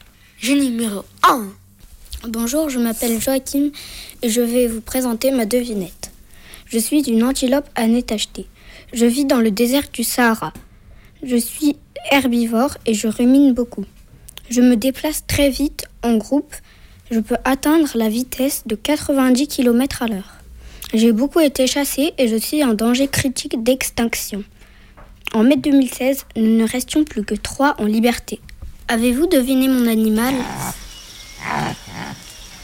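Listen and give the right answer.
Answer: l'addax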